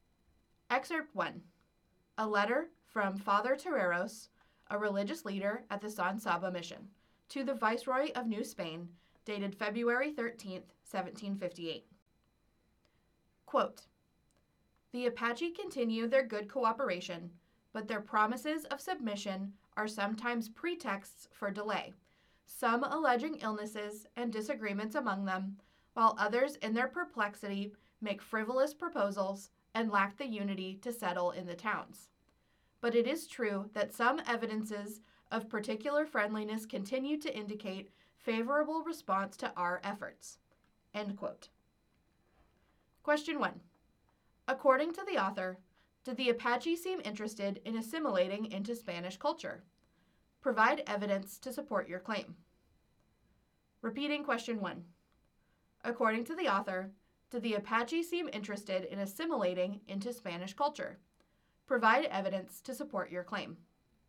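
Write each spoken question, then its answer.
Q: According to the author, did the Apache seem interested in assimilating into Spanish culture?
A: No; their promises of submission were often pretexts for delay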